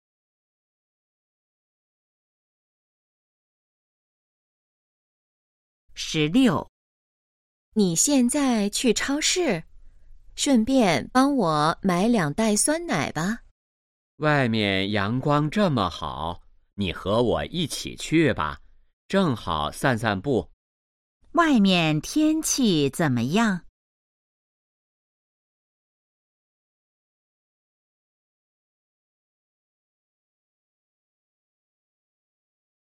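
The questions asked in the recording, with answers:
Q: 外面天气怎么样?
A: 阳光很好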